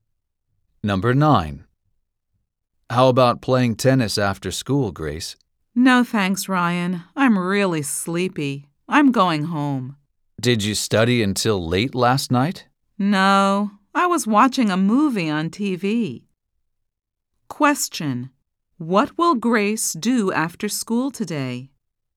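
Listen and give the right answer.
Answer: Go home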